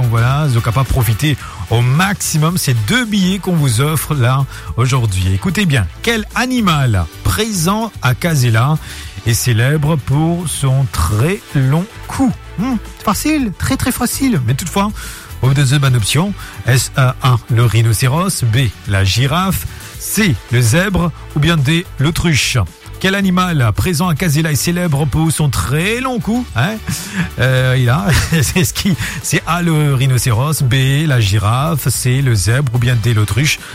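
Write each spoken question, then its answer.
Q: quel animal présent à Casella est célèbre pour son très long cou?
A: B: la girafe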